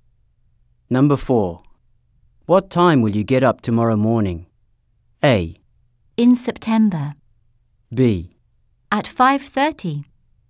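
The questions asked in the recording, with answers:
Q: What time will you get up tomorrow morning?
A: B: At 5:30.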